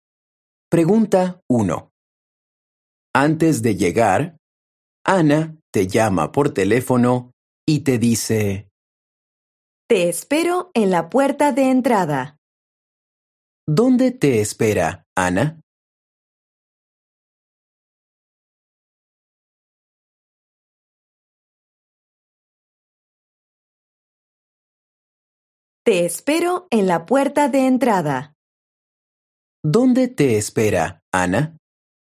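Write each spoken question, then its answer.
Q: ¿Dónde te espera, Ana?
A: En la puerta de entrada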